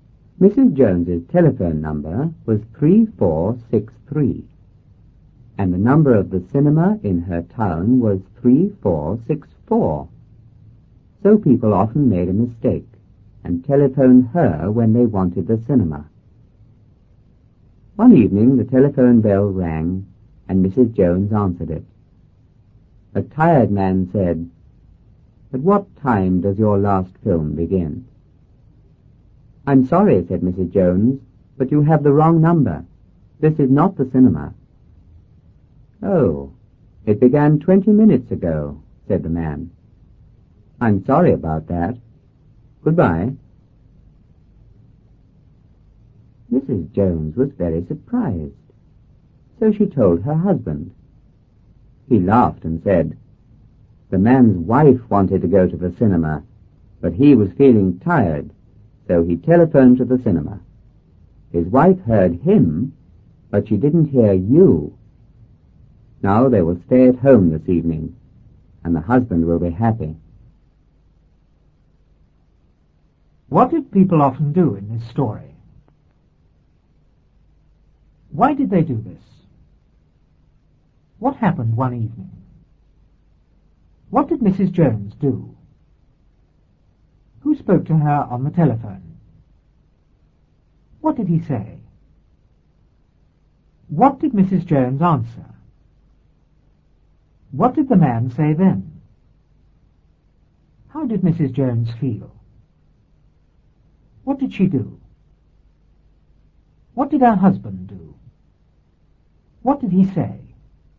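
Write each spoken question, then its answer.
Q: What did people often do in this story?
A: They telephoned Mrs. Jones by mistake when they wanted the cinema.

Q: Why did they do this?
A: Her number (3463) was almost the same as the cinema's (3464).

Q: What happened one evening?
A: The telephone bell rang.

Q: What did Mrs. Jones do?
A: She answered the telephone.

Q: Who spoke to her on the telephone?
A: A tired man.

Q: What did he say?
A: "At what time does your last film begin?"

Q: What did the man say then?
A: "Oh, it began 20 minutes ago. I'm sorry about that. Goodbye."

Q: How did Mrs. Jones feel?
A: Very surprised.

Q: What did she do?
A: She told her husband.

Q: What did her husband do?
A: He laughed.

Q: What did he say?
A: The man's wife wanted to go to the cinema, but he was tired, so he pretended to phone the cinema; now they will stay home and he will be happy.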